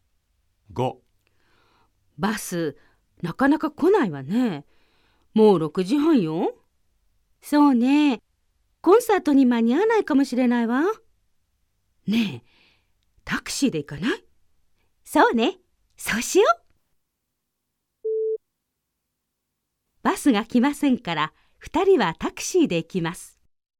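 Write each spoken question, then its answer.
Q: バスが来ませんから、2人はタクシーで行きます。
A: ○(正しい)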